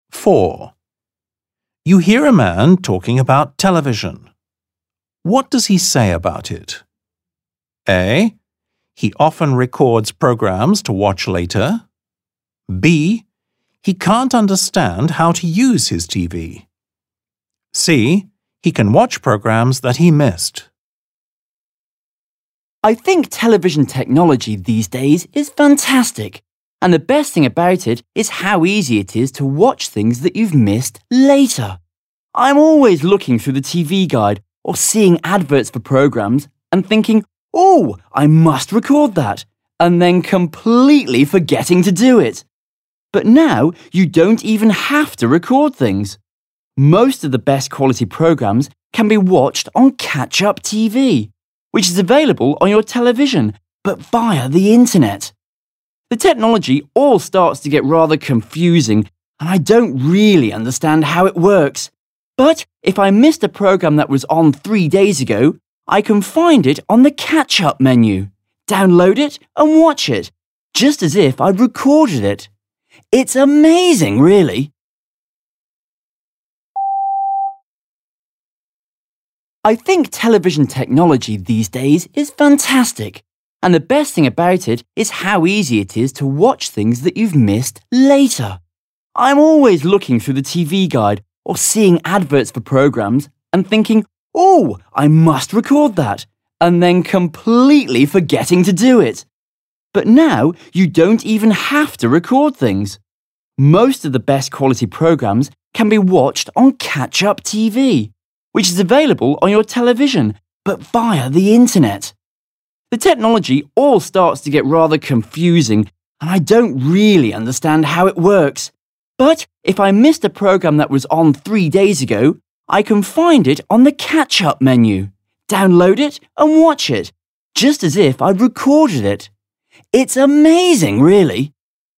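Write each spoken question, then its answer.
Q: What does he say about it?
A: C: He can watch programs that he missed.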